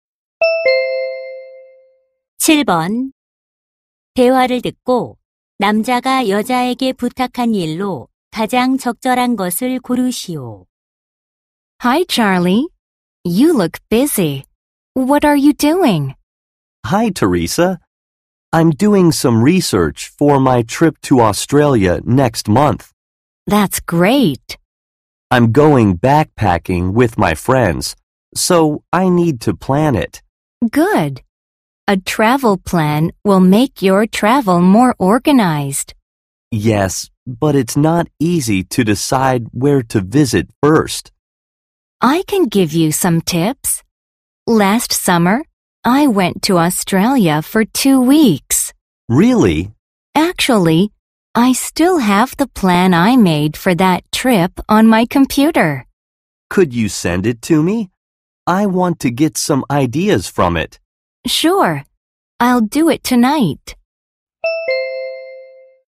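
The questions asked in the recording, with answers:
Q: 대화를 듣고 남자가 여자에게 부탁한 일로 가장 적절한 것을 고르시오.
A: 여행 계획서 보내 주기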